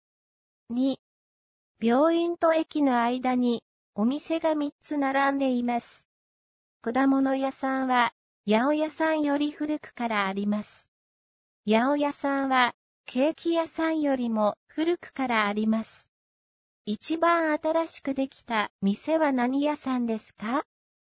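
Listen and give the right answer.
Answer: ケーキ屋さん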